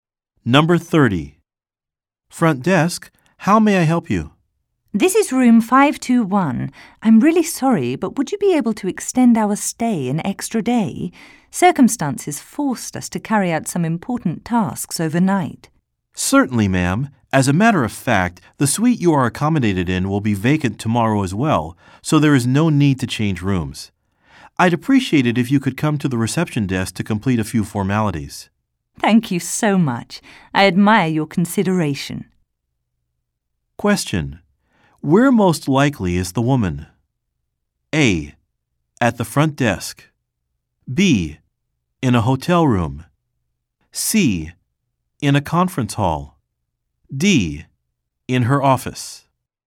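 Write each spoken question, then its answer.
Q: Where most likely is the woman?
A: B: In a hotel room.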